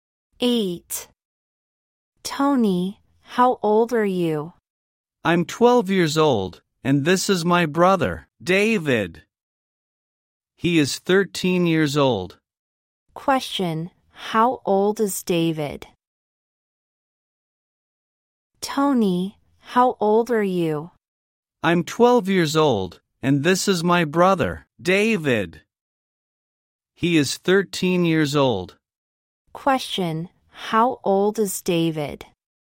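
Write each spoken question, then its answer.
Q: Question, how old is David?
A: 13 years old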